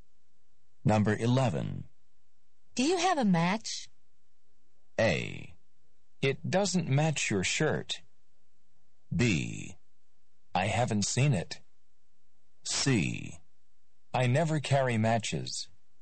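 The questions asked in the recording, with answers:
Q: Do you have a match?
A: C: I never carry matches.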